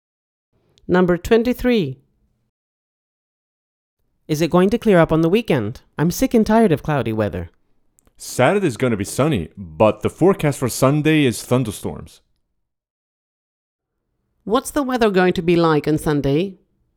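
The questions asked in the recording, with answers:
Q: What's the weather going to be like on Sunday?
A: Thunderstorms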